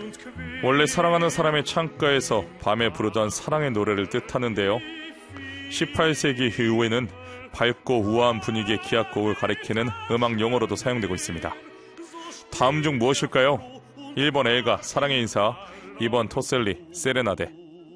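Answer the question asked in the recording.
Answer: 2: 토셀리 세레나데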